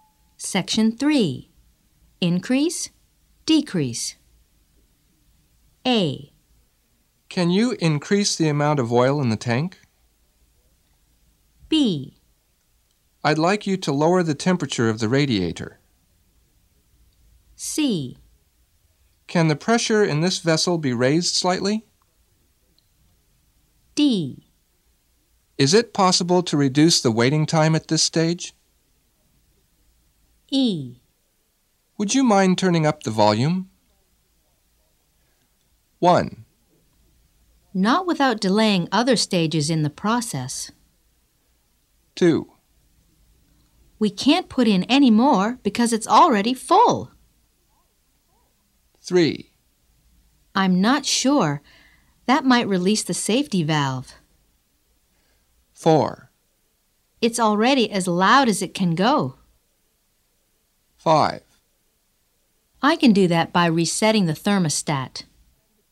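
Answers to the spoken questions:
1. D: Is it possible to reduce the waiting time at this stage?
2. A: Can you increase the amount of oil in the tank?
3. C: Can the pressure in this vessel be raised slightly?
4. E: Would you mind turning up the volume?
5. B: I'd like you to lower the temperature of the radiator.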